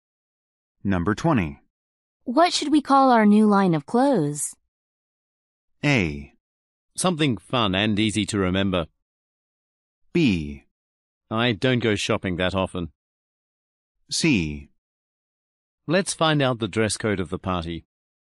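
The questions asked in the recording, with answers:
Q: What should we call our new line of clothes?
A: A: Something fun and easy to remember.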